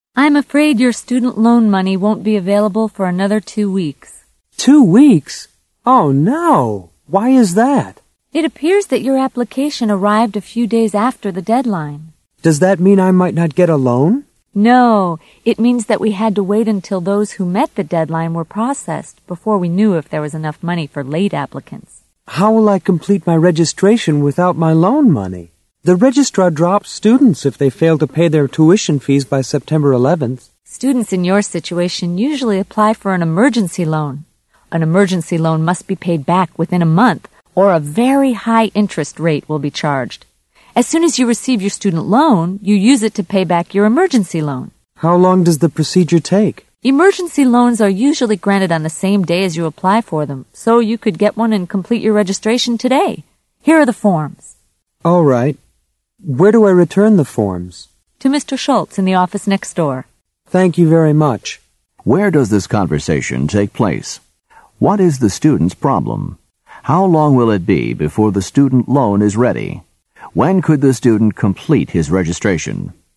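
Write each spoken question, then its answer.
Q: What is the student's problem?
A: His student loan money won't be available for 2 weeks because his application was late

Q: How long will it be before the student loan is ready?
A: 2 weeks

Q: When could the student complete his registration?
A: Today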